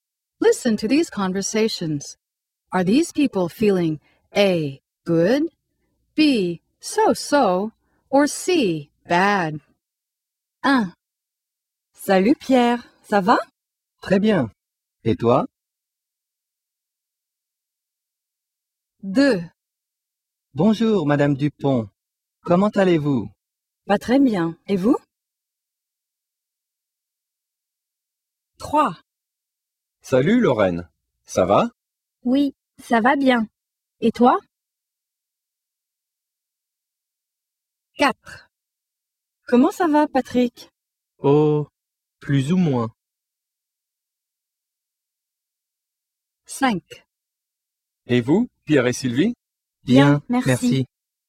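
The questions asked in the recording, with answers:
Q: Are these people feeling A, good, B, so-so, or C, bad?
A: A: good

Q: Are these people feeling A, good, B, so-so, or C, bad?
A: C: bad

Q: Are these people feeling A, good, B, so-so, or C, bad?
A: A: good

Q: Are these people feeling A, good, B, so-so, or C, bad?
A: B: so-so

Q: Are these people feeling A, good, B, so-so, or C, bad?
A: A: good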